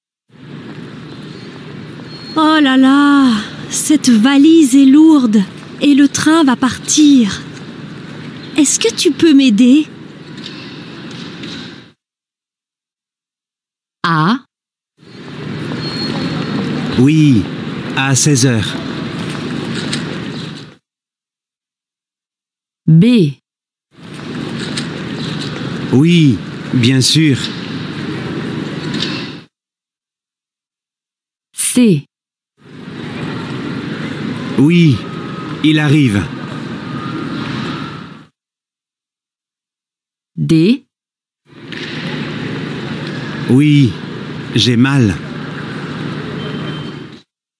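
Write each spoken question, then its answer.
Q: Est-ce que tu peux m'aider?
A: B: Oui, bien sûr.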